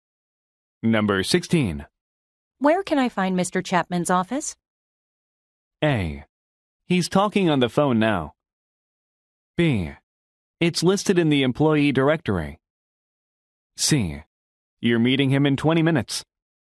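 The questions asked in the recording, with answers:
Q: Where can I find Mr. Chapman's office?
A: B: It's listed in the employee directory.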